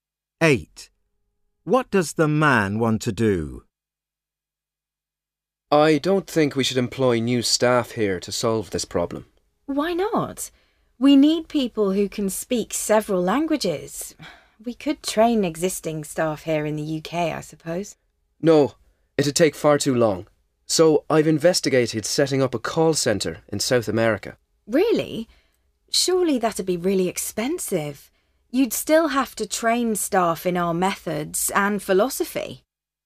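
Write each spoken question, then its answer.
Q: What does the man want to do?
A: Set up a call centre in South America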